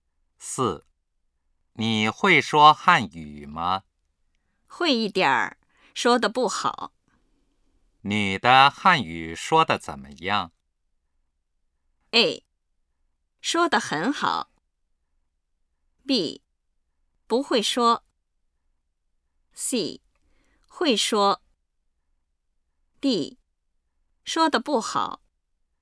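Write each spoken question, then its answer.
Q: 女的汉语说得怎么样?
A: D: 说得不好。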